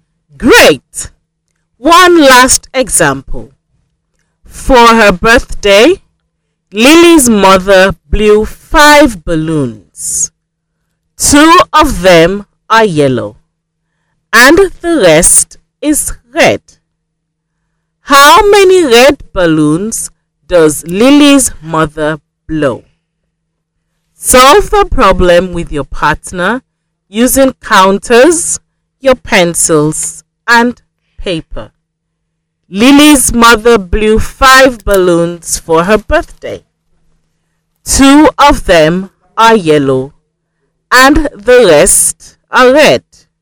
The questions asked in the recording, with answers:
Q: How many red balloons does Lily's mother blow?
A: There are 3 red balloons.